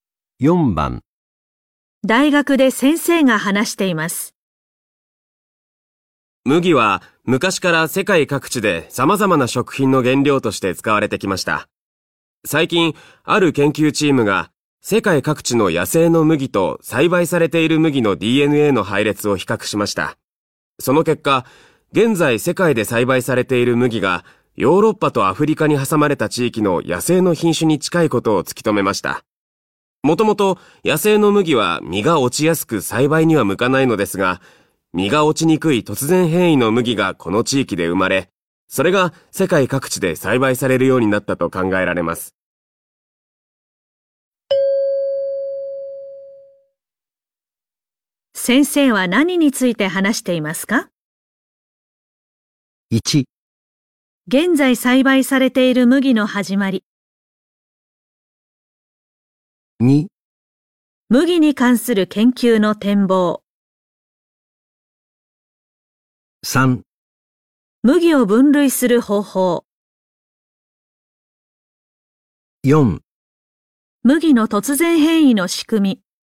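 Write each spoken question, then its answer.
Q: 先生は何について話していますか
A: 1: 現在栽培されている麦の始まり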